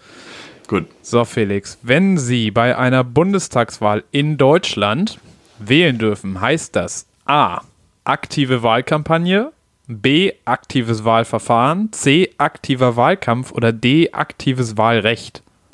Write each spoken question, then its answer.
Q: So, Felix, wenn Sie bei einer Bundestagswahl in Deutschland wählen dürfen, heißt das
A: Ja, auf jeden Fall D.